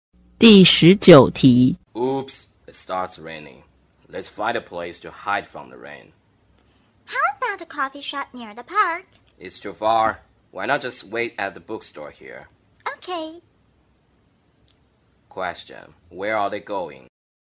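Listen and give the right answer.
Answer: To the bookstore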